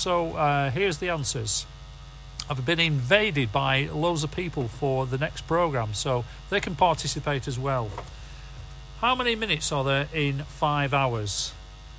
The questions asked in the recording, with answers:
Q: How many minutes are there in 5 hours?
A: 300.